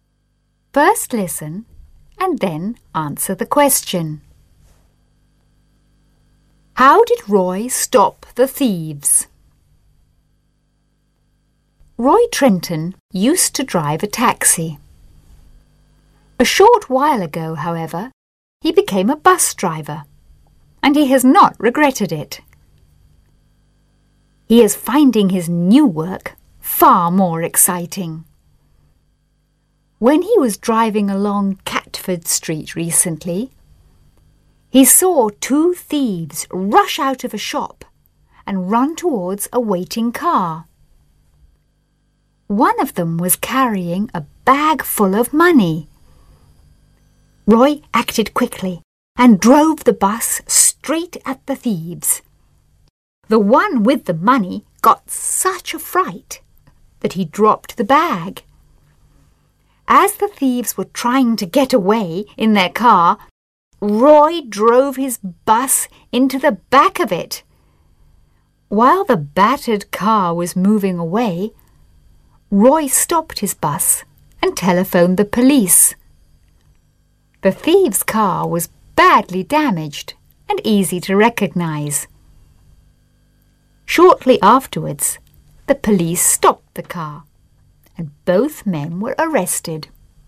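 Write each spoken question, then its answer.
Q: How did Roy stop the thieves?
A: He drove his bus straight at them and then into the back of their car.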